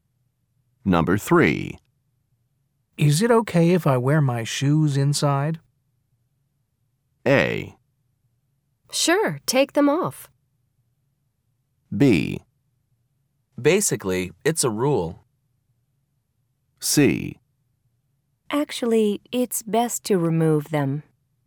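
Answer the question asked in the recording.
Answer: C: Actually, it's best to remove them.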